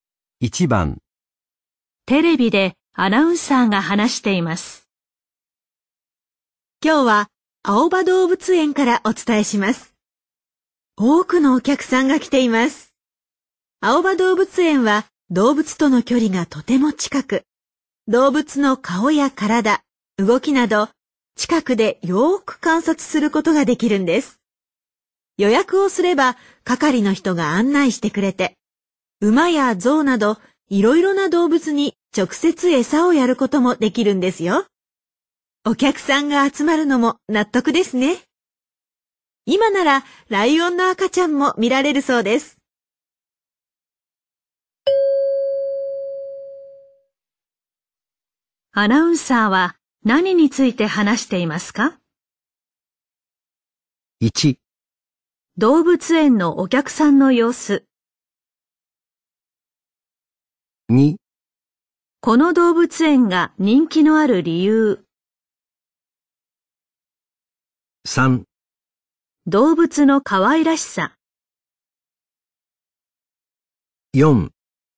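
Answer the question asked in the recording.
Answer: 2: この動物園が人気のある理由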